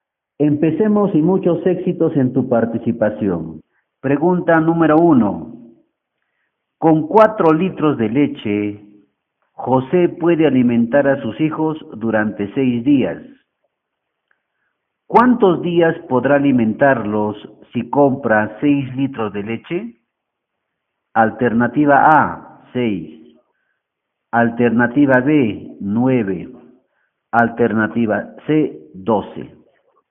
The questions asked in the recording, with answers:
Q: ¿Cuántos días podrá alimentarlos si compra 6 litros de leche?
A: B, 9.